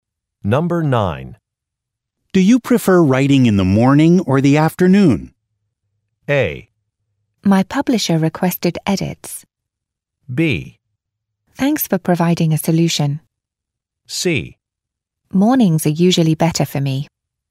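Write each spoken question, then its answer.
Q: Do you prefer writing in the morning or the afternoon?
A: C: Mornings are usually better for me.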